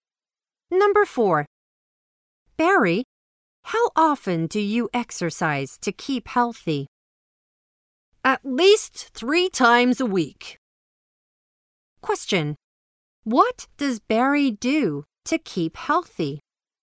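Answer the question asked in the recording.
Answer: He exercises at least 3 times a week.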